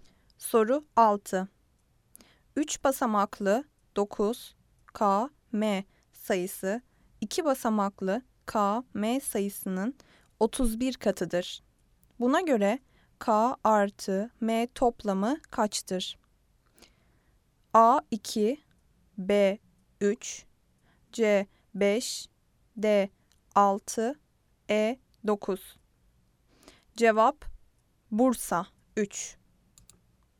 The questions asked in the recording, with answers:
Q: Buna göre K artı M toplamı kaçtır?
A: Cevap Bursa 3